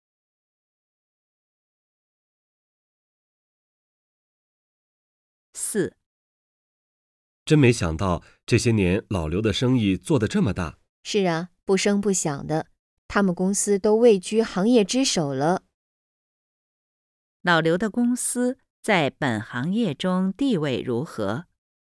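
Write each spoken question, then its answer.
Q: 老刘的公司在本行业中地位如何?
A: 位居行业之首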